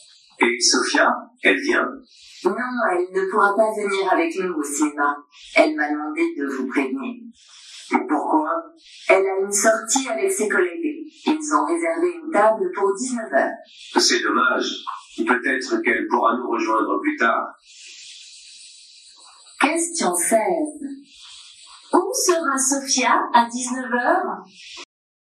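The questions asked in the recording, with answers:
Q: Où sera Sophia à 19h?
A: Au restaurant avec ses collègues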